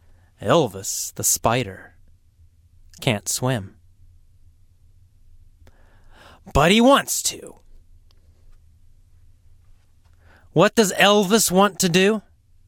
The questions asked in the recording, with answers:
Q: What does Elvis want to do?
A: Swim. Elvis wants to swim.